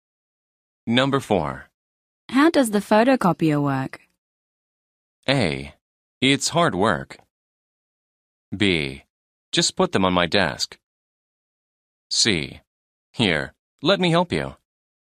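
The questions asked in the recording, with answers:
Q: How does the photocopier work?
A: C: Here, let me help you.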